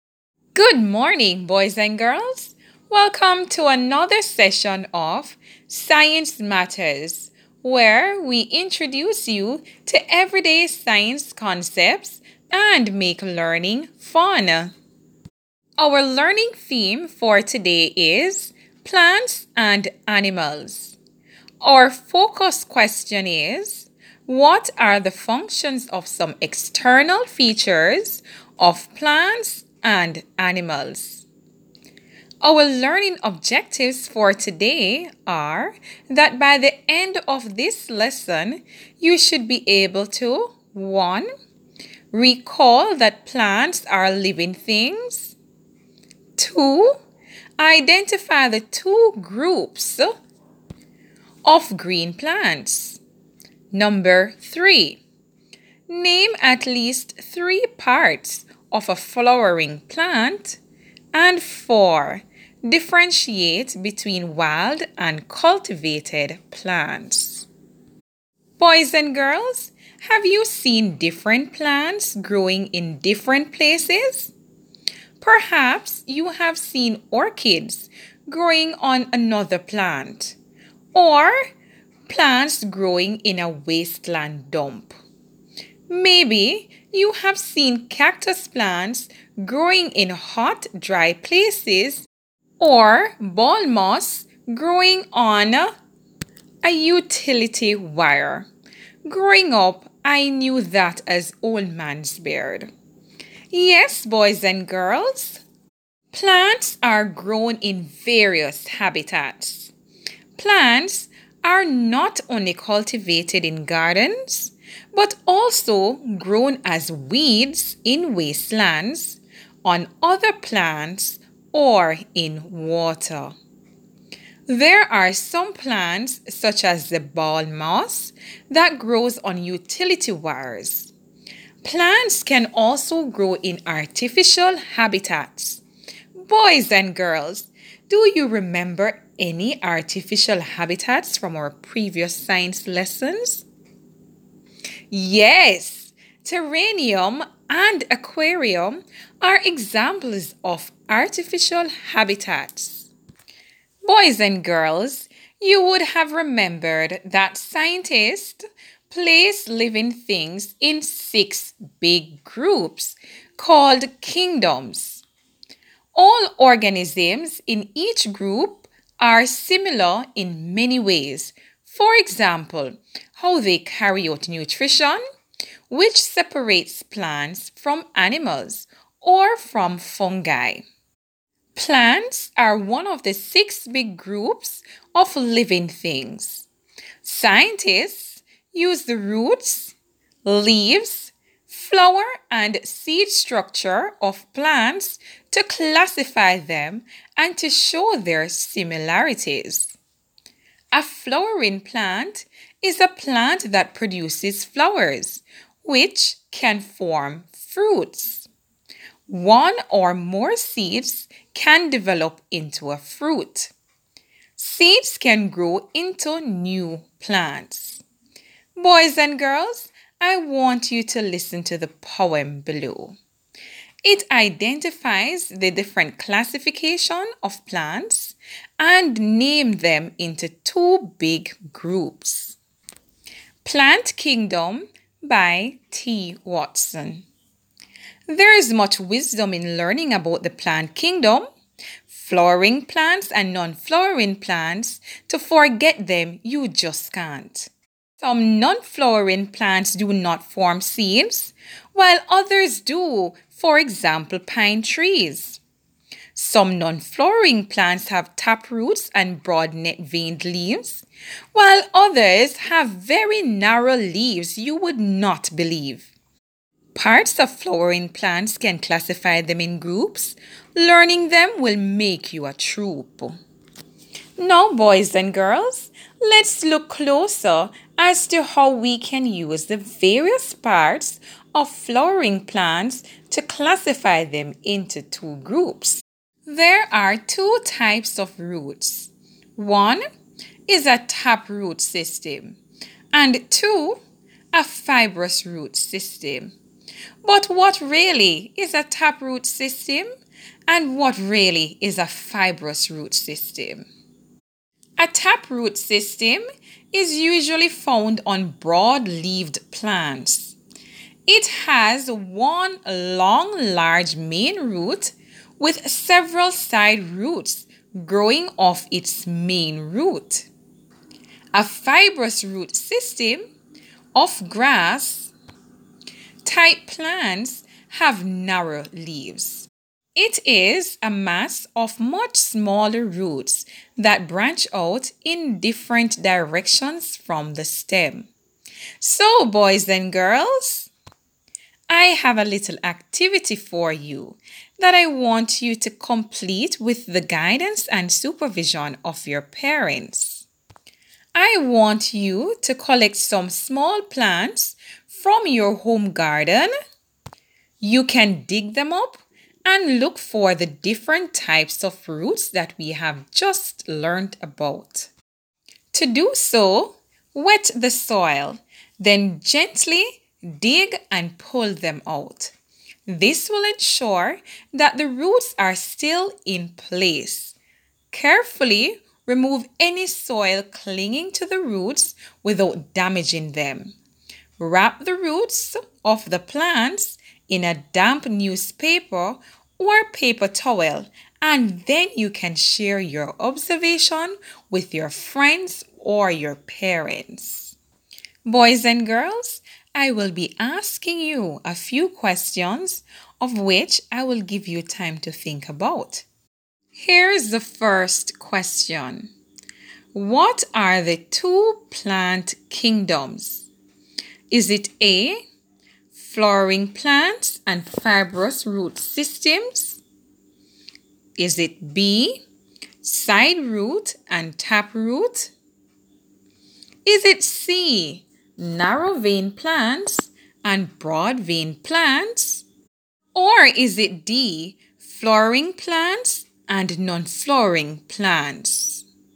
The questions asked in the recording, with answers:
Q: What are the two plant kingdoms?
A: If your answer was D, flowering plants and non-flowering plants, you are correct.